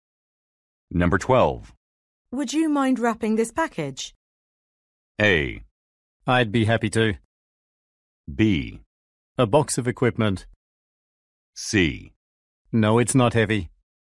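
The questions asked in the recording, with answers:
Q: Would you mind wrapping this package?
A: A: I'd be happy to.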